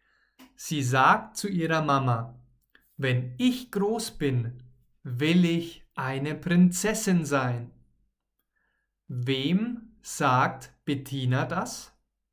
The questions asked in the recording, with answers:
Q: Wem sagt Bettina das?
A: ihrer